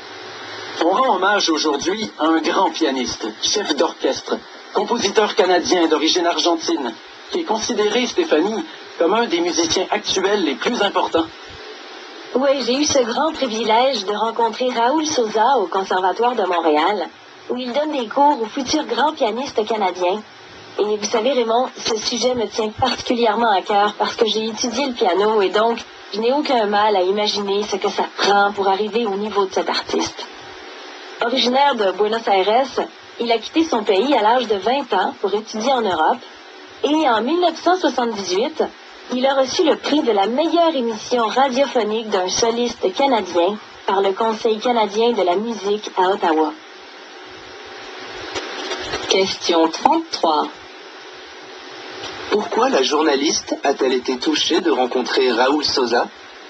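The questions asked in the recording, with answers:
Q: Pourquoi la journaliste a-t-elle été touchée de rencontrer Raoul Sosa?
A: Parce qu'elle a elle-même étudié le piano.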